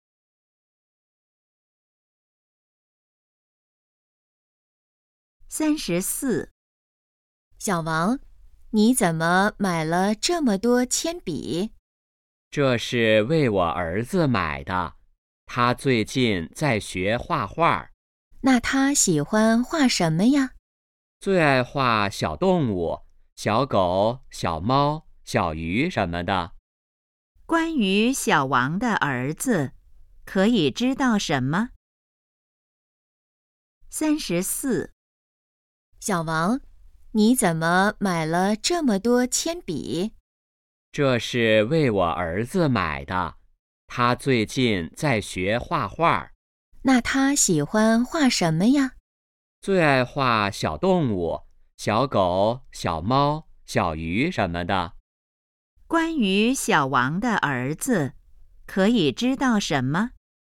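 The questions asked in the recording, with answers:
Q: 关于小王的儿子,可以知道什么?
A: 在学画画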